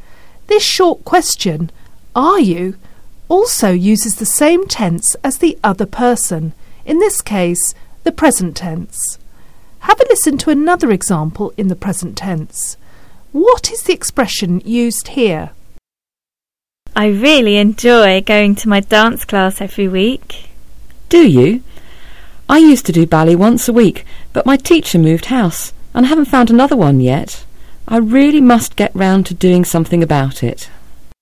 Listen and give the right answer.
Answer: Do you? Do you?